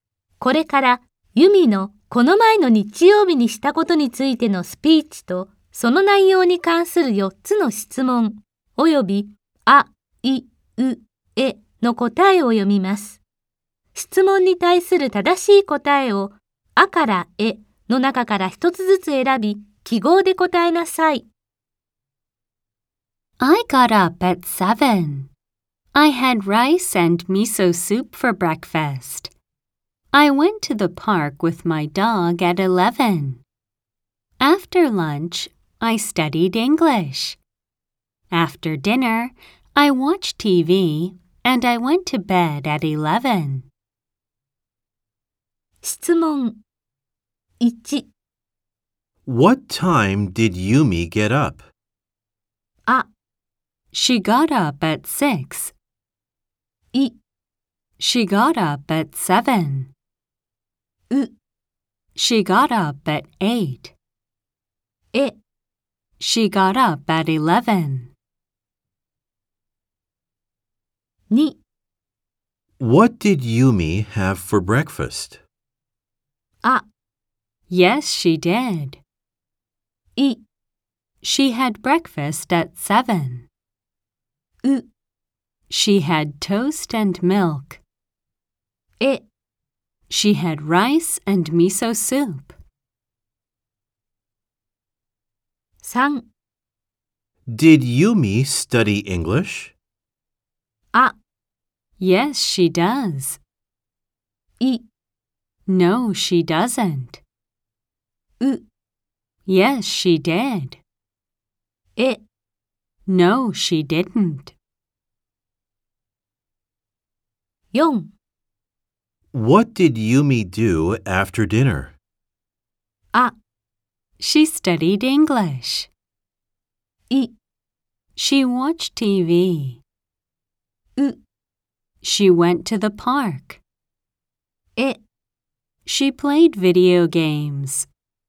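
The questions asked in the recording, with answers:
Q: What time did Yumi get up?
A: い: She got up at 7.

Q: What did Yumi have for breakfast?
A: え: She had rice and miso soup.

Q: Did Yumi study English?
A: う: Yes, she did.

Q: What did Yumi do after dinner?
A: い: She watched TV.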